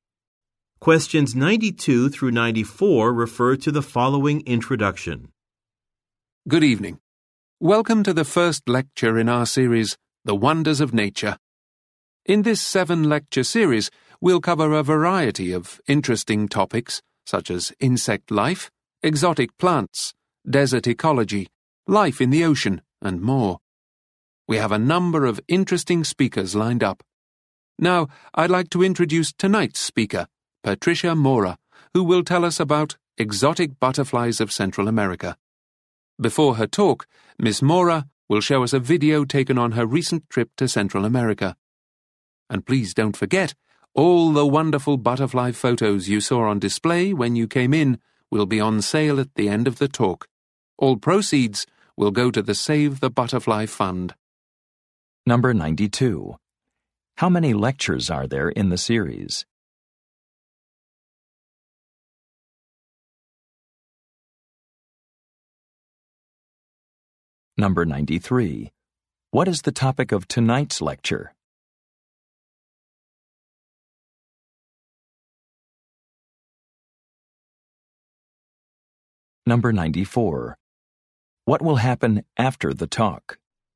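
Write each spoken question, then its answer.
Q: How many lectures are there in the series?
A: Seven

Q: What is the topic of tonight's lecture?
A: Exotic butterflies of Central America

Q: What will happen after the talk?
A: Butterfly photos will be sold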